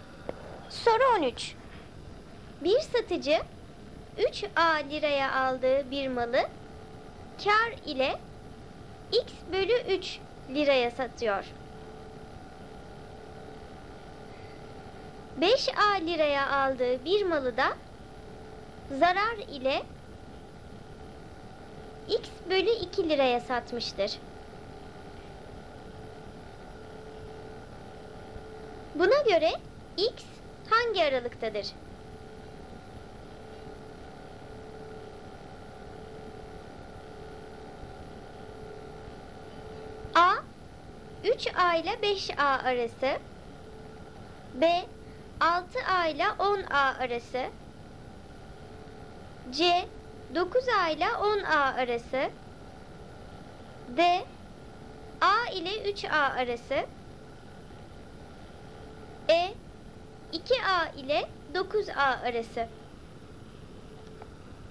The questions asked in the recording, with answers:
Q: Buna göre x hangi aralıktadır?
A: Doğru cevap C seçeneği. 9A ile 10A arasındaydı x.